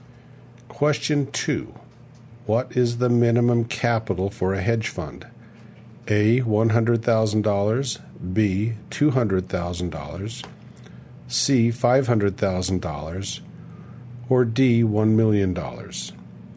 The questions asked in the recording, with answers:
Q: What is the minimum capital for a hedge fund?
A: And the answer is A. $100,000.